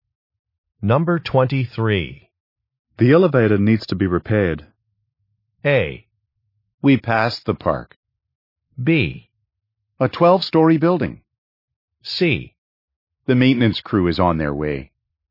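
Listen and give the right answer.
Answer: C: The maintenance crew is on their way.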